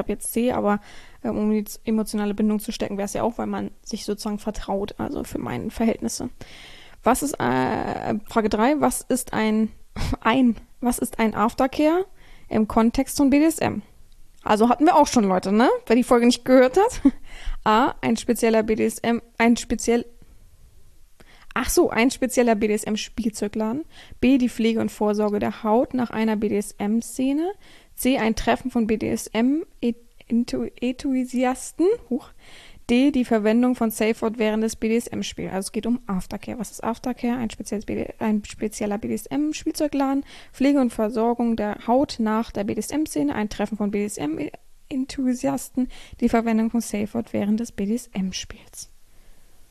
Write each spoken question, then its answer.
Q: was ist ein Aftercare im Kontext von BDSM?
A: Antwort 3, B, die Pflege und Versorgung der Haut nach einer BDSM-Szene, richtig.